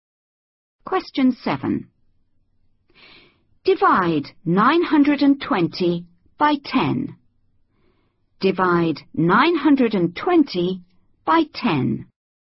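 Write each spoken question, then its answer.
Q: Divide 920 by 10.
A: 92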